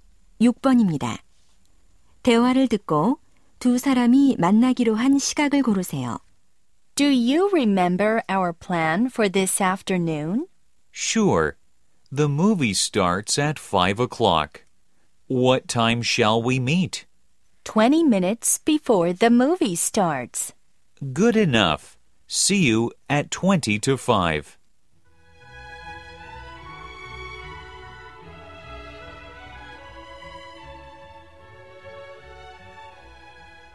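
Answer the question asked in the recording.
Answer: 4시 40분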